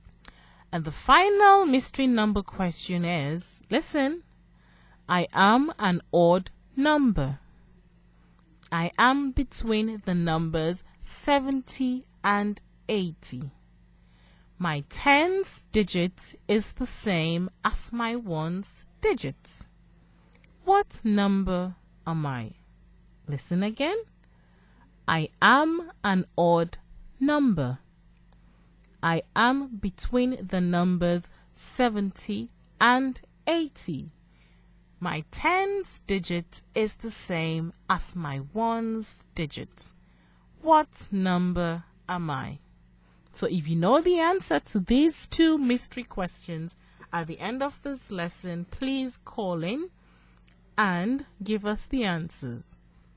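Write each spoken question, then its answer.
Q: What number am I?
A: 77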